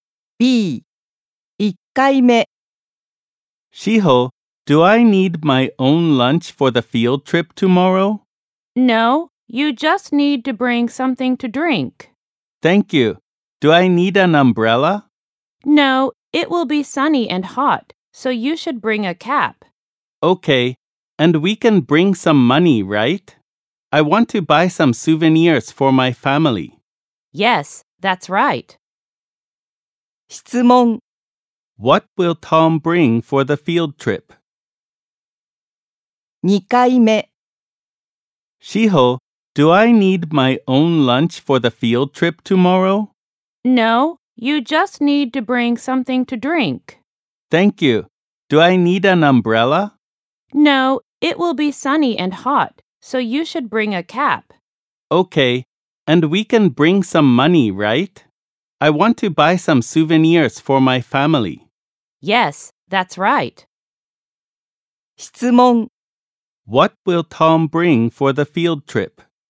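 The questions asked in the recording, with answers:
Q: What will Tom bring for the field trip?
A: Something to drink, a cap, and some money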